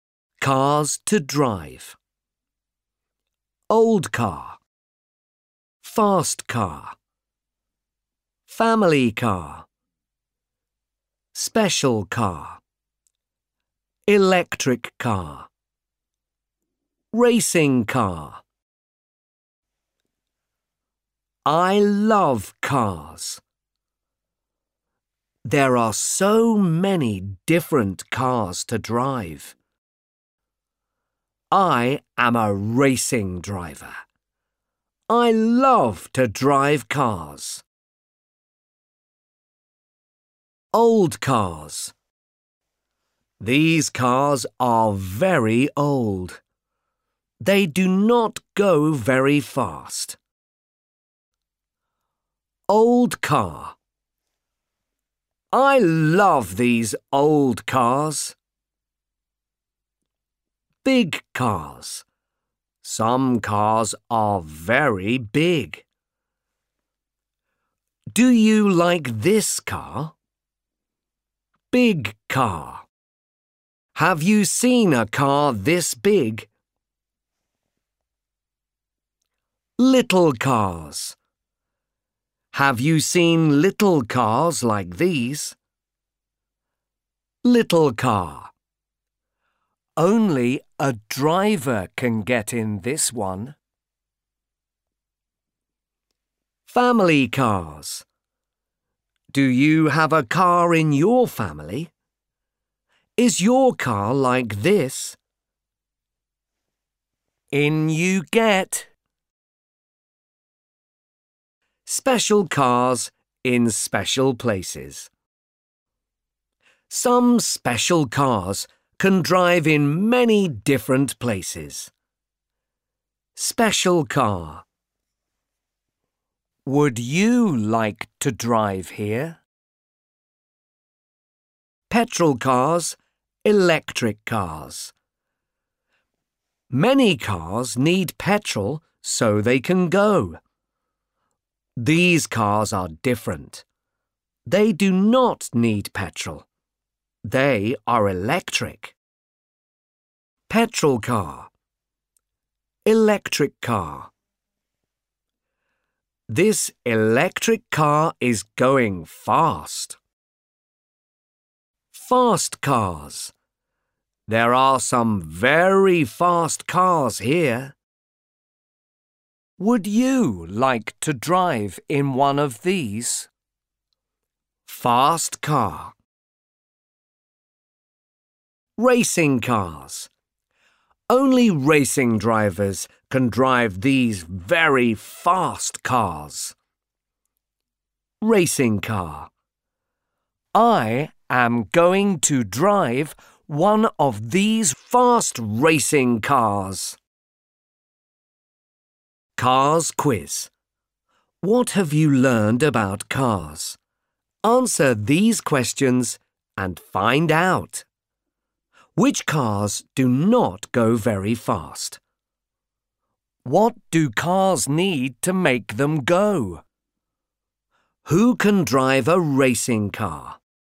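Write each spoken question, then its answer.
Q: Which cars do not go very fast?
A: Old cars

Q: What do cars need to make them go?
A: Petrol

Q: Who can drive a racing car?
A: Only racing drivers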